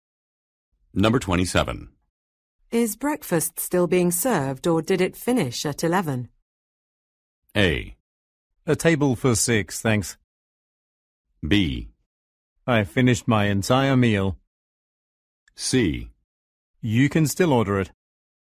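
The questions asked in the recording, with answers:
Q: Is breakfast still being served or did it finish at 11?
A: C: You can still order it.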